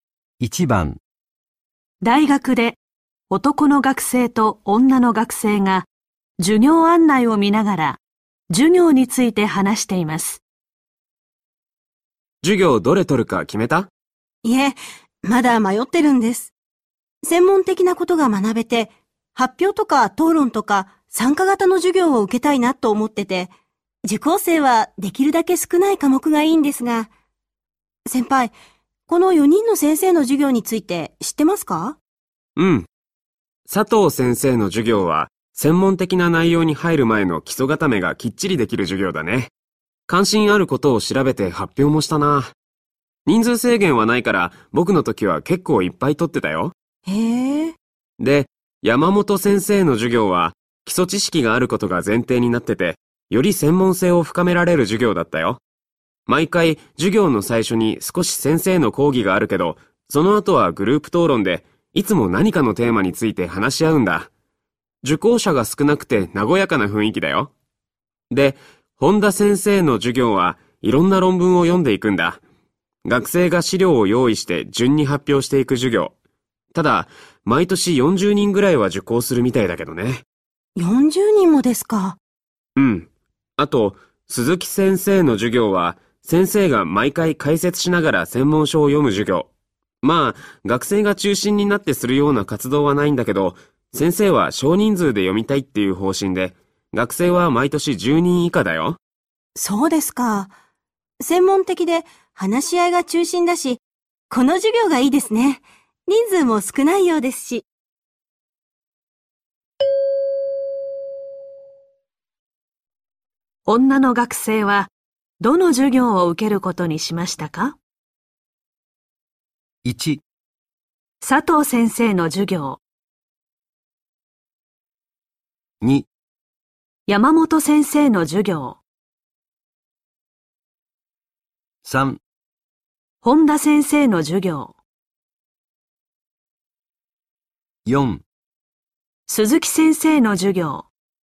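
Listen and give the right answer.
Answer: 2: 山本先生の授業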